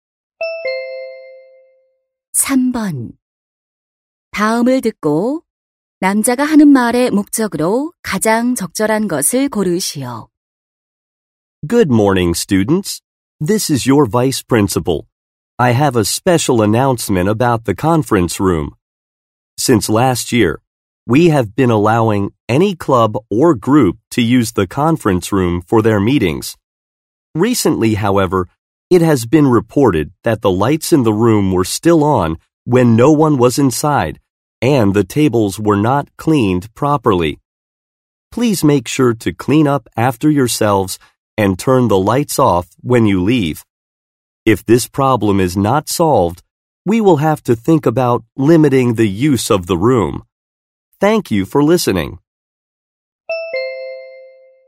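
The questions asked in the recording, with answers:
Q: 다음을 듣고 남자가 하는 말의 목적으로 가장 적절한 것을 고르시오.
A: 회의실 사용 후 청소하고 불을 끄도록 당부하려고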